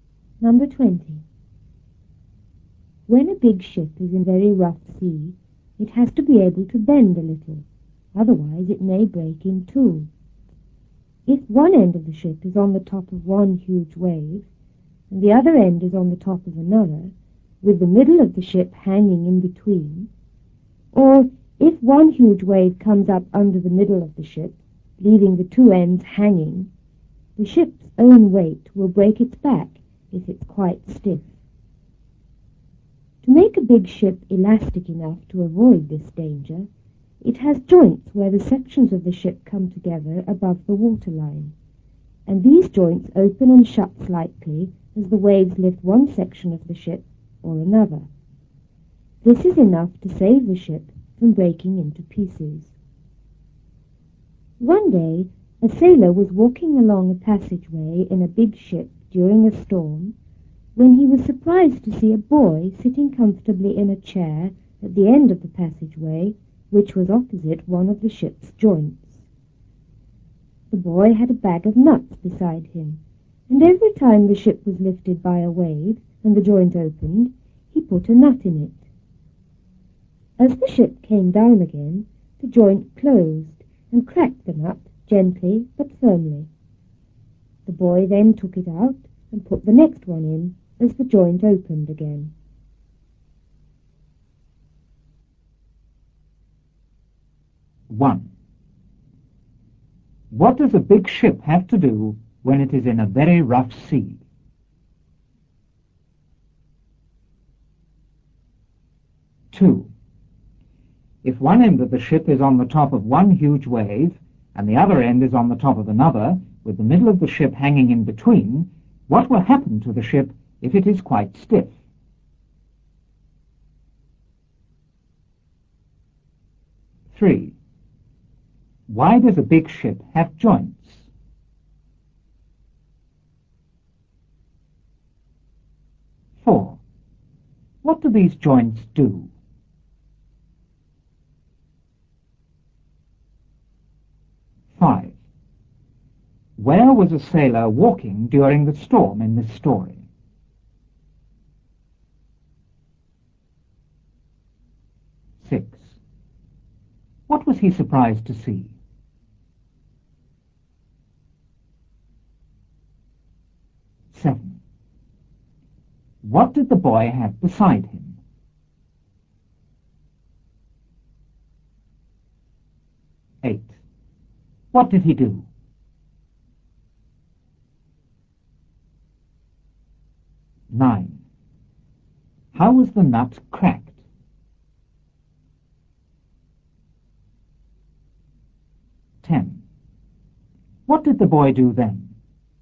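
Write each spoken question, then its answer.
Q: What does a big ship have to do when it is in a very rough sea?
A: It has to be able to bend a little.

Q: If one end of the ship is on the top of one huge wave, and the other end is on the top of another, with the middle of the ship hanging in between, what will happen to the ship if it is quite stiff?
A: Its own weight will break its back.

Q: Why does a big ship have joints?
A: To make it elastic enough so it doesn't break.

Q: What do these joints do?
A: They open and shut slightly as the waves lift the ship.

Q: Where was a sailor walking during the storm in this story?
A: Along a passageway in a big ship.

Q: What was he surprised to see?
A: A boy sitting comfortably in a chair at the end of the passageway.

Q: What did the boy have beside him?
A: A bag of nuts.

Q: What did he do?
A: He put a nut in the joint every time it opened.

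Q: How was the nut cracked?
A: The joint closed on it as the ship came down.

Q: What did the boy do then?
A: He took the nut out and put the next one in.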